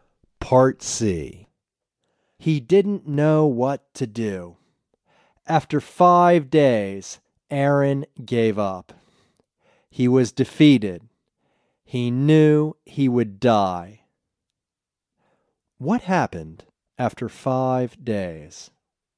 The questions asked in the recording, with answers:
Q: What happened after 5 days?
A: After 5 days, Aaron gave up.